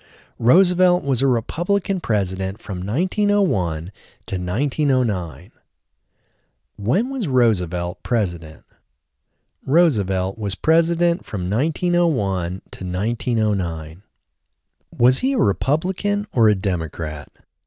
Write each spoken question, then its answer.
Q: Was he a Republican or a Democrat?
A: He was a Republican.